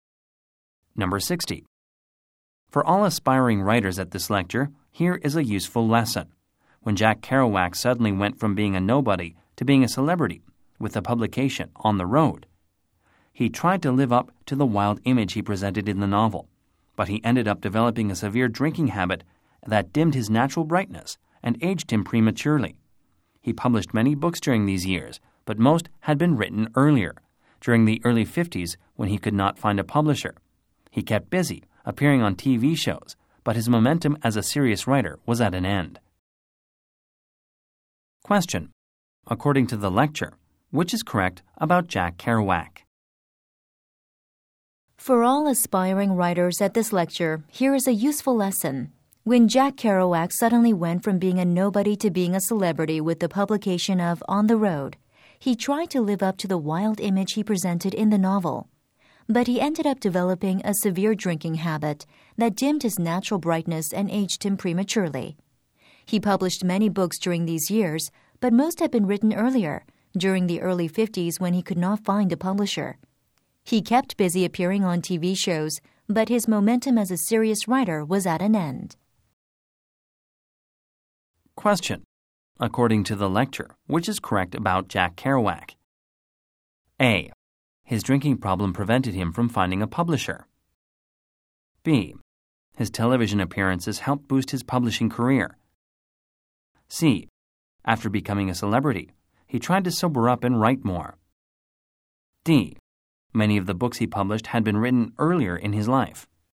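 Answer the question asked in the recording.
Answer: D: Many of the books he published had been written earlier in his life.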